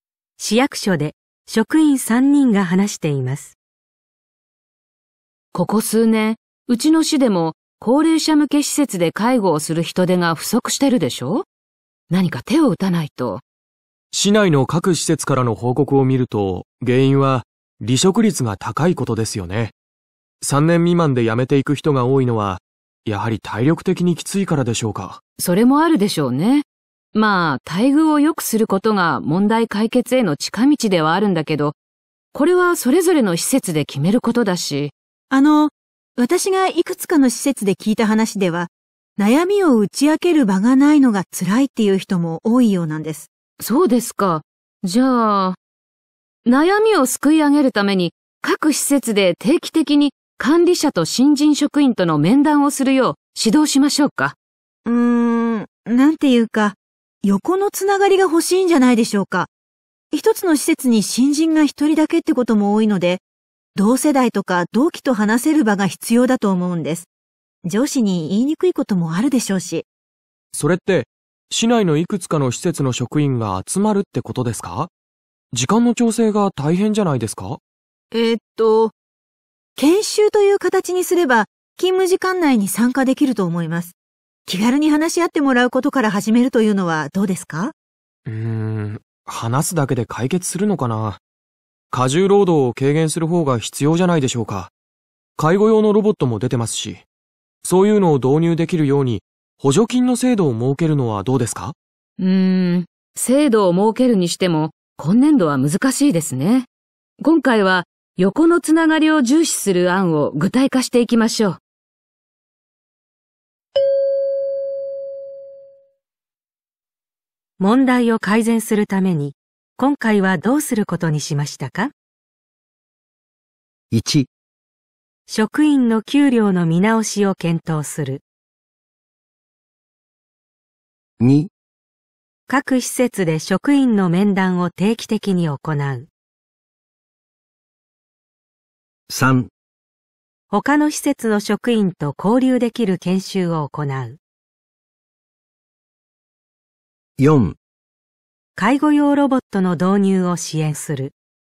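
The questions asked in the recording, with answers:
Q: を改善するために、今回はどうすることにしましたか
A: 3: 他の施設の職員と交流できる研修を行う。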